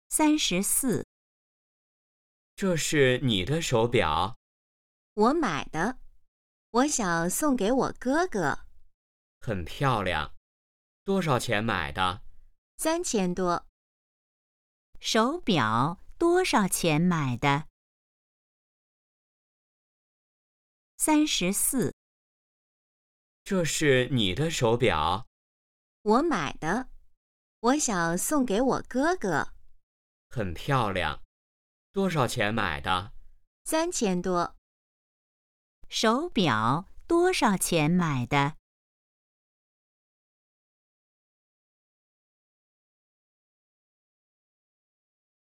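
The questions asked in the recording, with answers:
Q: 手表多少钱买的?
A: 3000多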